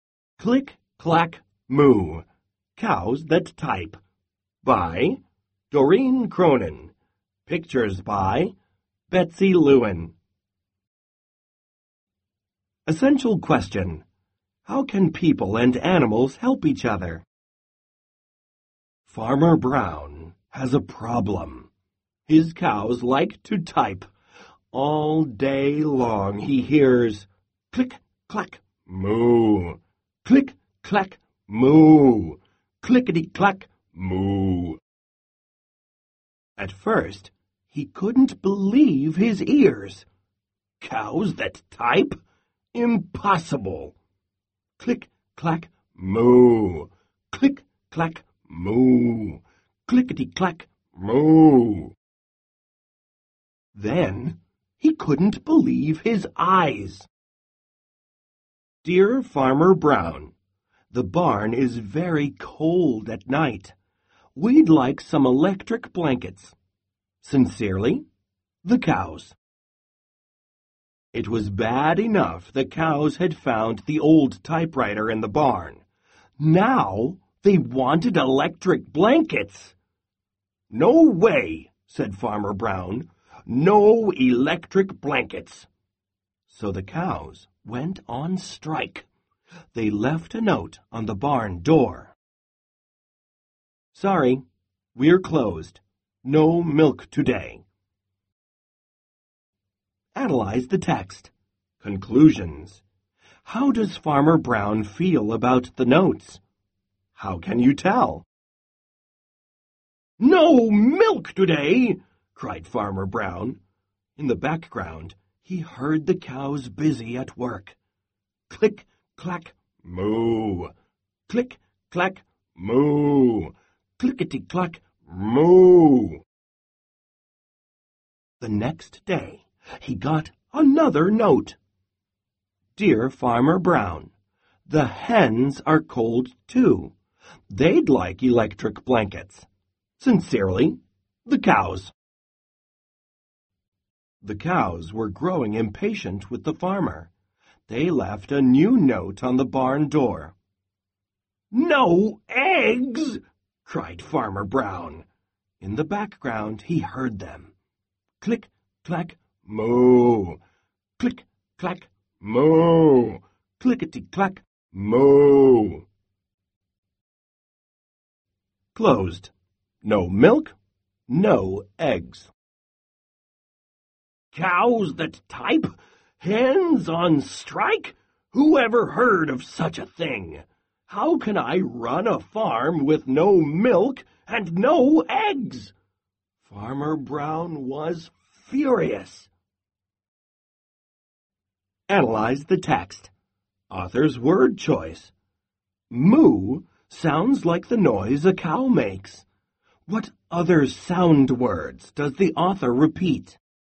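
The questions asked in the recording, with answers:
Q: What other sound words does the author repeat?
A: Click, clack, and clickety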